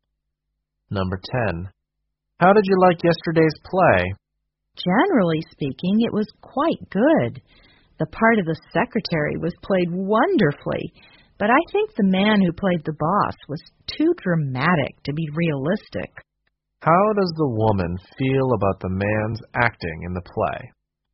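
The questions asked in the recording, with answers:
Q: How does the woman feel about the man's acting in the play?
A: She thinks he was too dramatic to be realistic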